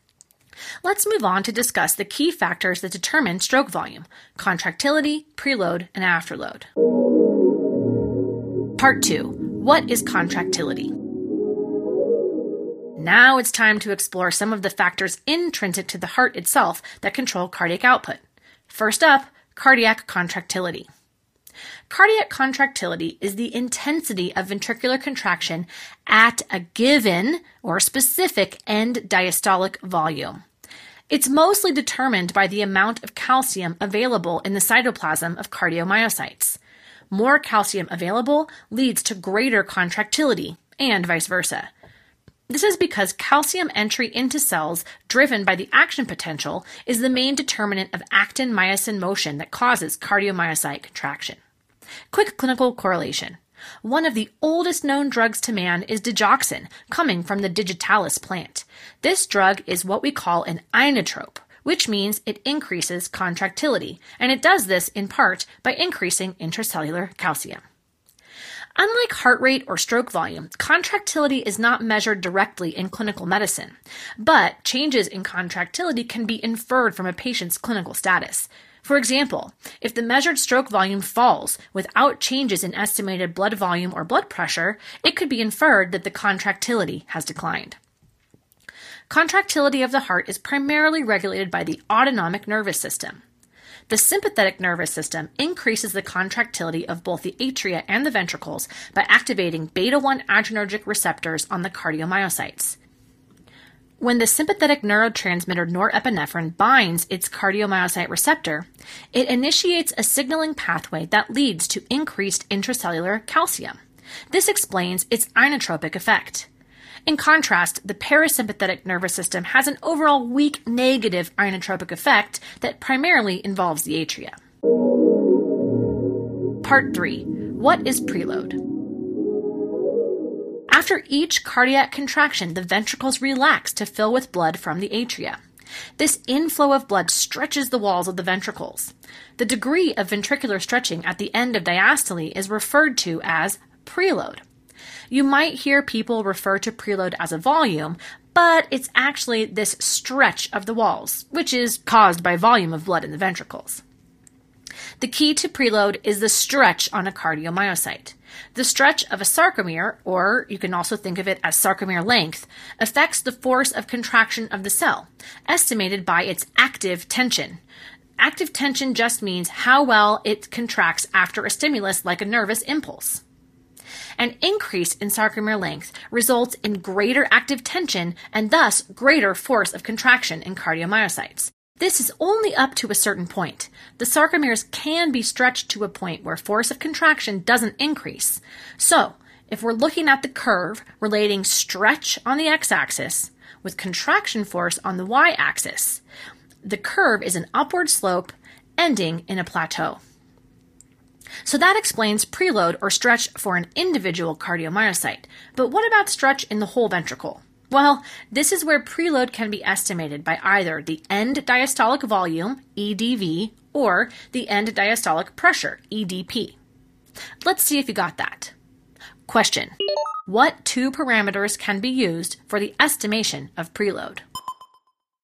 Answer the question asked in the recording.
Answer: Answer is end diastolic volume, EDV, and end diastolic pressure, EDP.